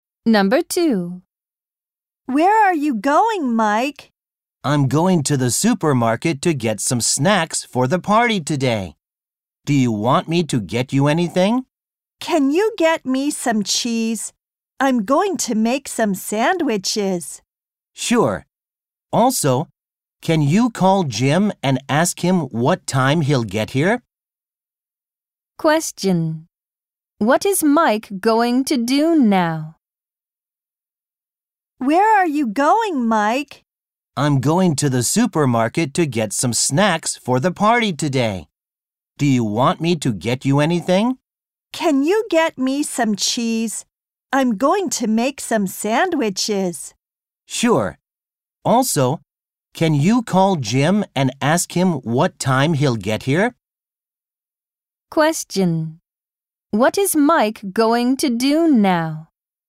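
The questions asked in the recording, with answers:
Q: What is Mike going to do now?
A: Go to the supermarket to get snacks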